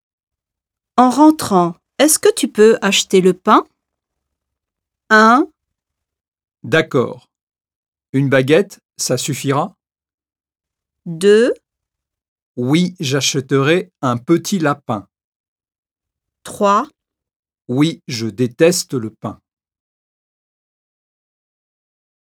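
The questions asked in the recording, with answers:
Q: En rentrant, est-ce que tu peux acheter le pain?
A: 1: D'accord. Une baguette, ça suffira?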